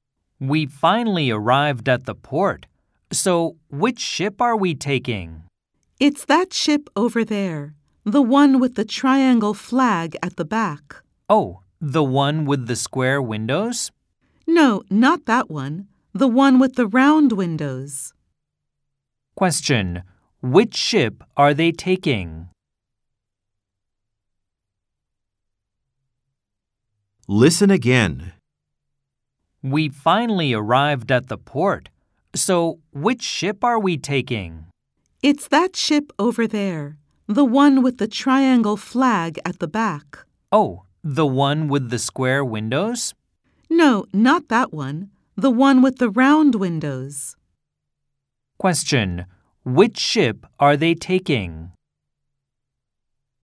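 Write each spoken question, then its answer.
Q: which ship are they taking?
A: The ship with the triangle flag at the back and round windows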